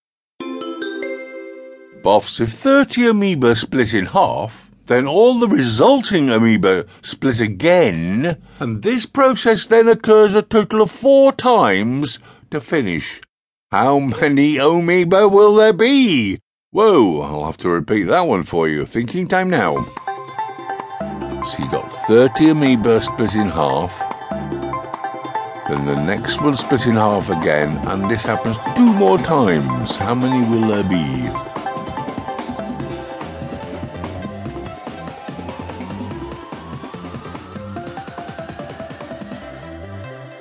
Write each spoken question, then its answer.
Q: How many amoeba will there be?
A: 480.